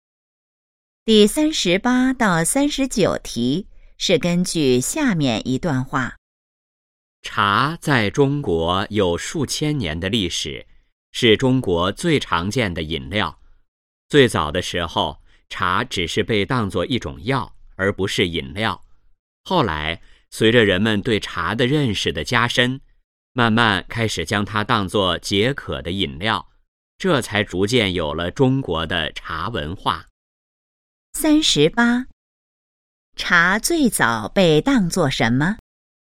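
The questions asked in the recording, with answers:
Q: 茶最早被当作什么?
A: 一种药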